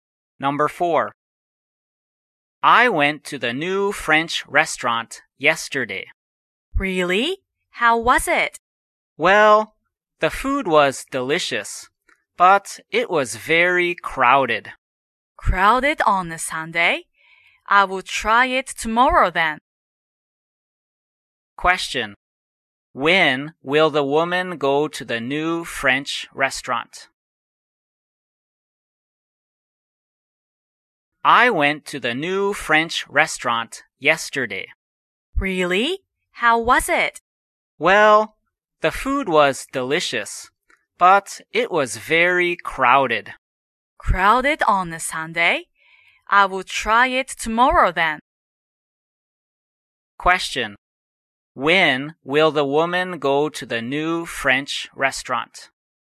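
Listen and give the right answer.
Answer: Tomorrow (Monday).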